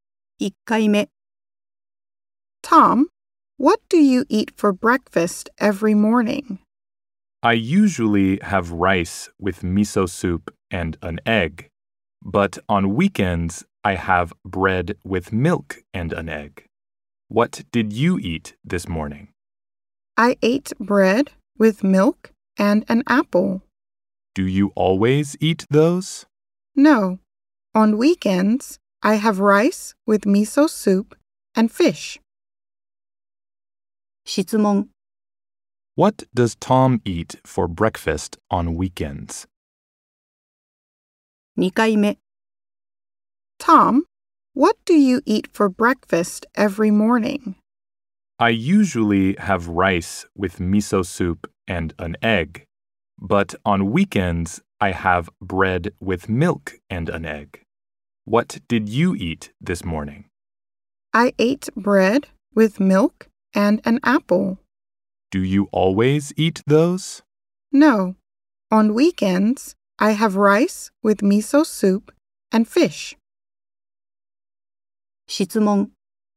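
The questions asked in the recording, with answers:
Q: What does Tom eat for breakfast on weekends?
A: Rice with miso soup and fish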